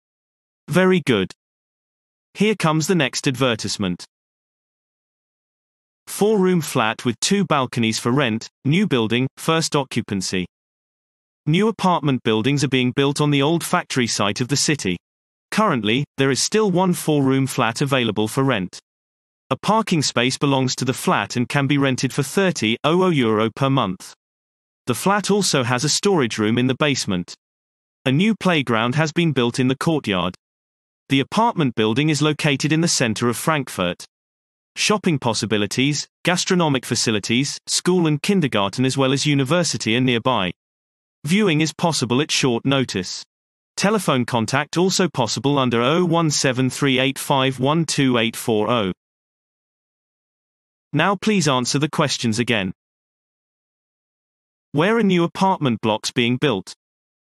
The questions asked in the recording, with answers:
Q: Where are new apartment blocks being built?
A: Answer. The apartment buildings are being built on the old factory site in the city.